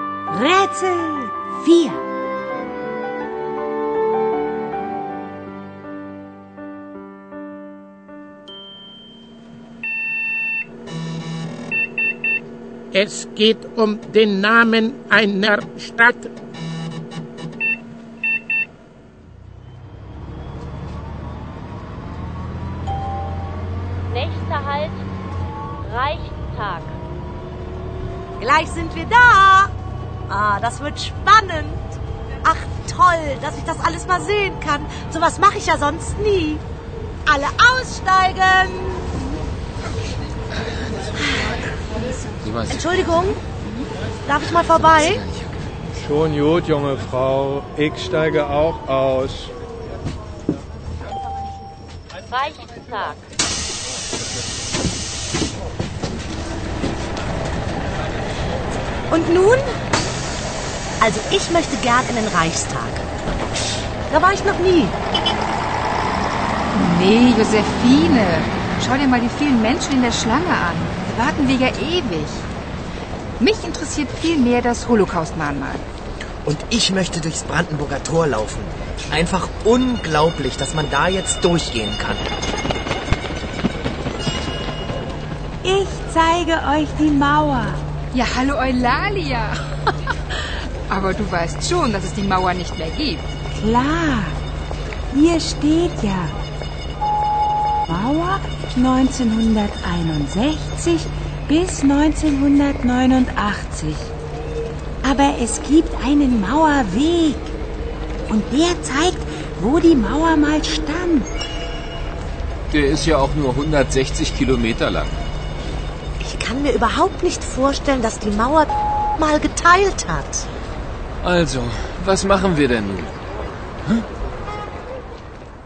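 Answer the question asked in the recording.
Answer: Berlin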